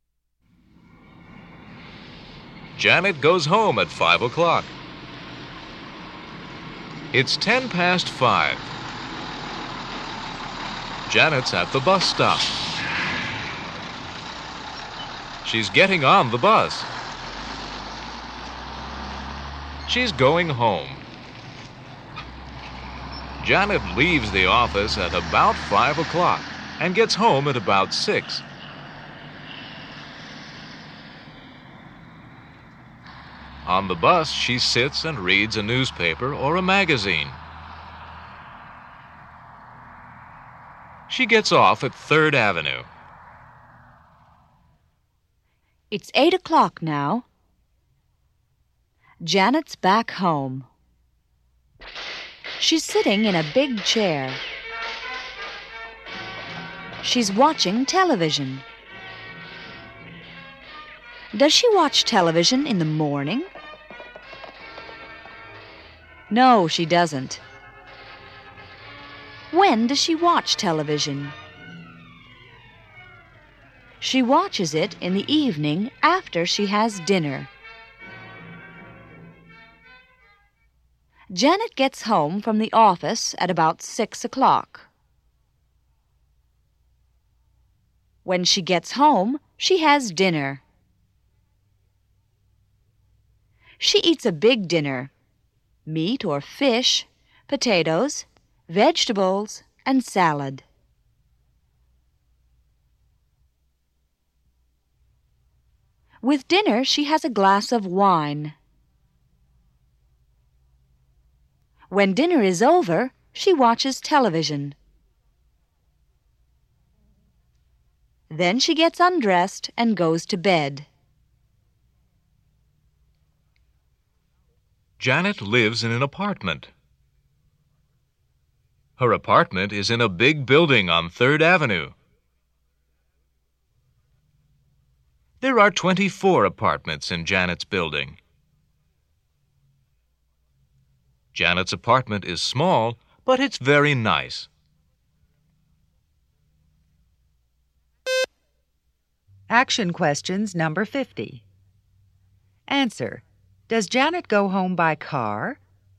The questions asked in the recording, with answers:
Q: does Janet go home by car?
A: No, she doesn't.